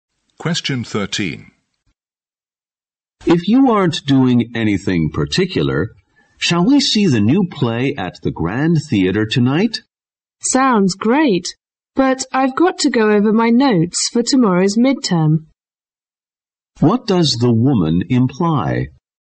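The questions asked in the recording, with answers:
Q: What does the woman imply?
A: She can't go to the play because she has to prepare for tomorrow's midterm.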